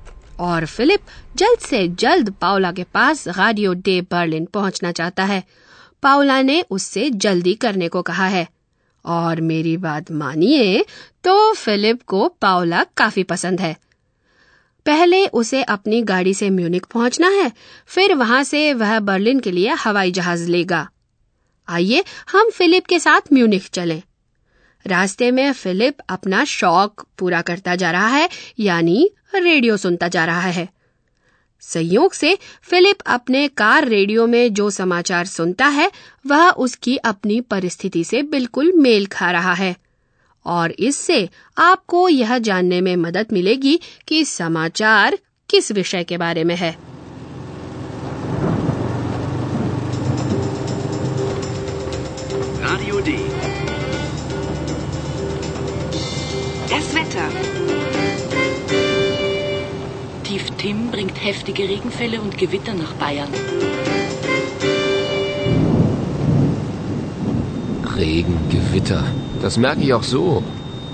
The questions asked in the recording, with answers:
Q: इससे आपको यह जानने में मदद मिलेगी कि समाचार किस विषय के बारे में है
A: समाचार का विषय था मौसम